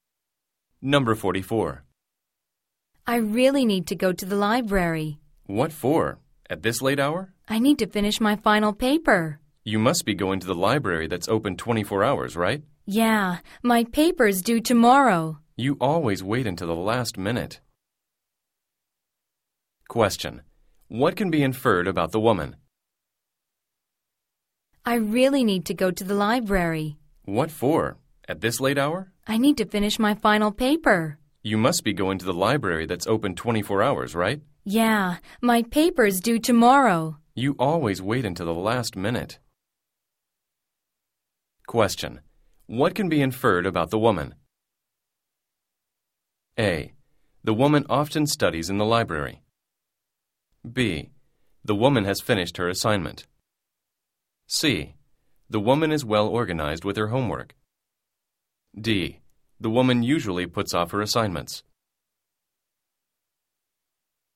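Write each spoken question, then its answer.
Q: What can be inferred about the woman?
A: D: The woman usually puts off her assignments.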